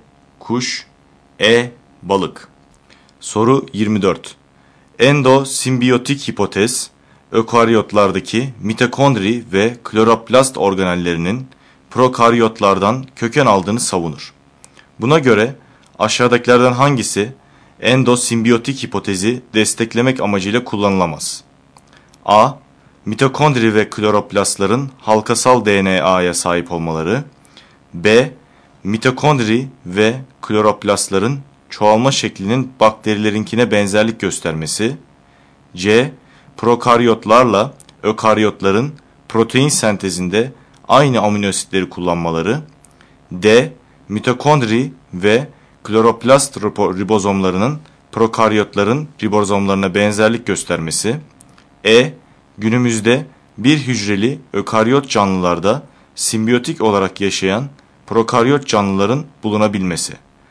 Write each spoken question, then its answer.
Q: Buna göre aşağıdakilerden hangisi endosimbiyotik hipotezi desteklemek amacıyla kullanılamaz?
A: Doğru yanıt C şıkkı.